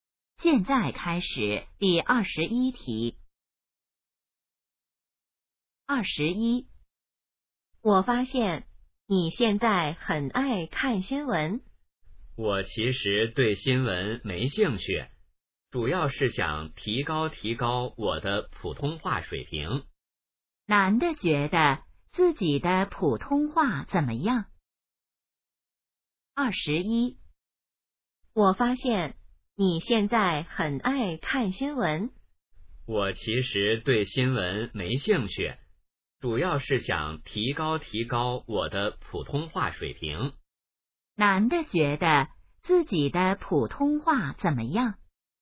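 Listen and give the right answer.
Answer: 需要提高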